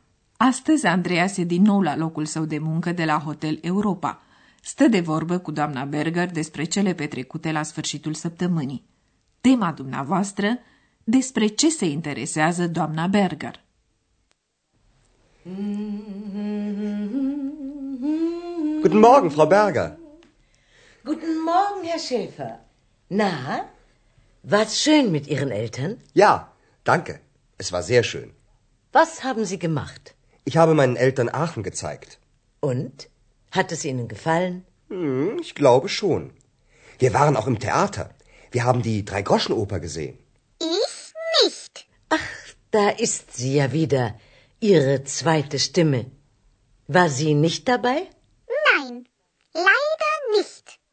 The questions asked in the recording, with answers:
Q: Despre ce se interesează doamna Berger?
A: Doamna Berger se interesează cum și-au petrecut timpul părinții lui Andreas și dacă le-a plăcut ahănul.